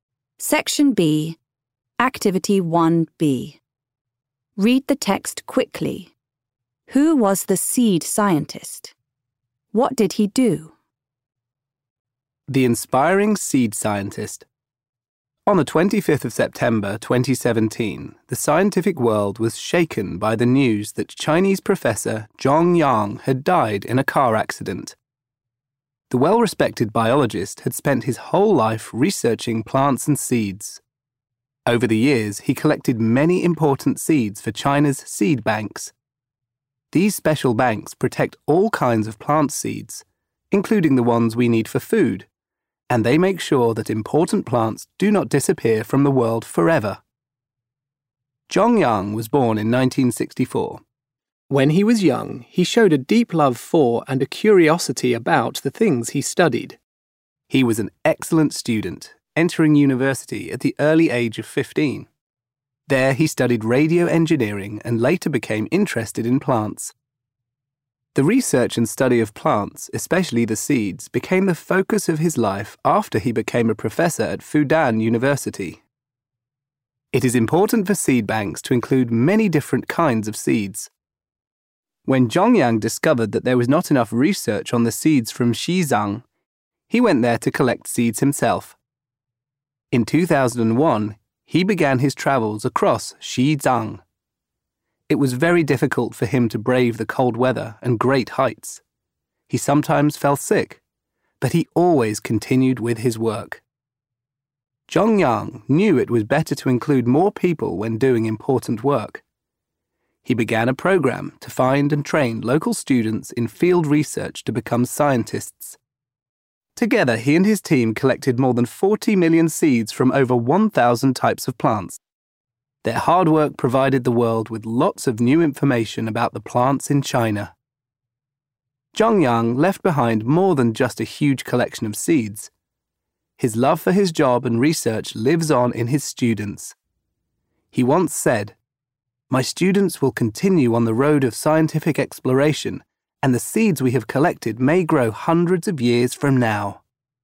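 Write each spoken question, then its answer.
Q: Who was the seed scientist?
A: Zhong Yang, a Chinese professor and biologist at Fudan University

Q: What did he do?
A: He researched plants and seeds and collected many important seeds (over 40 million, many from Xizang) for China's seed banks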